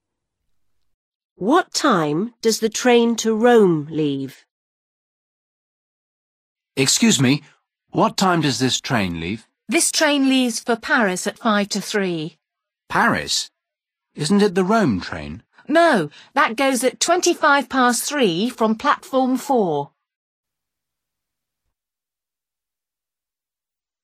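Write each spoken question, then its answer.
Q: What time does the train to Rome leave?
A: 3:25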